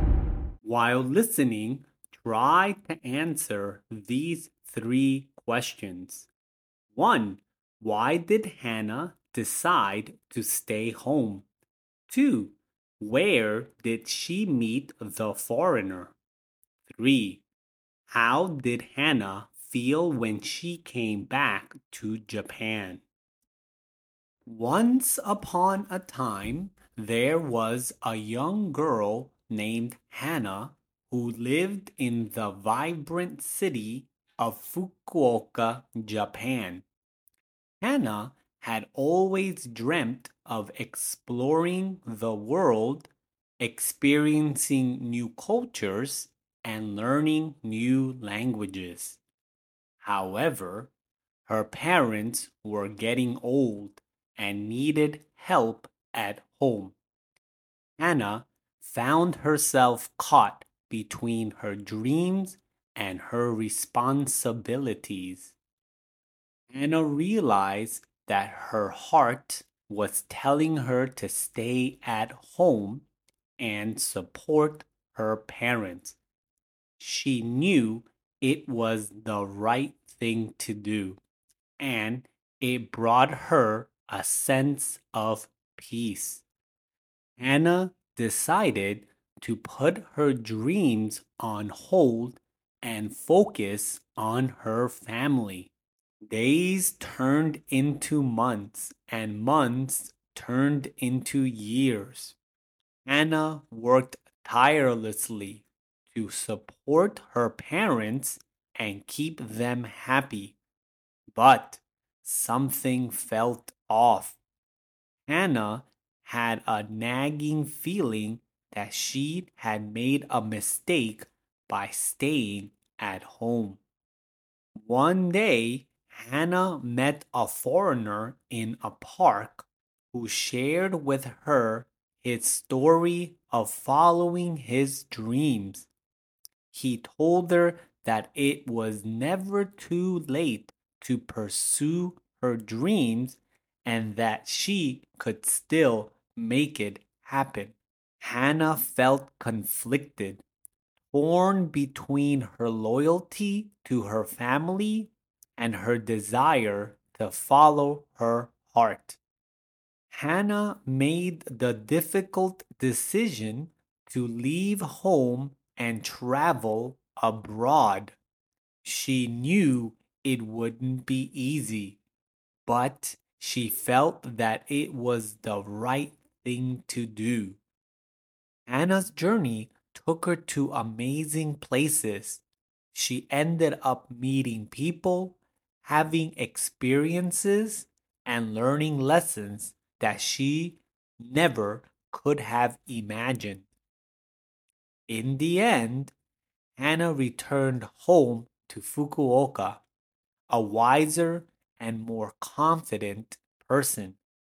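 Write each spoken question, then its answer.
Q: Why did Hana decide to stay home?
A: Her parents were getting old and needed help at home.

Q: Where did she meet the foreigner?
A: In a park

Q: How did Hana feel when she came back to Japan?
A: Wiser and more confident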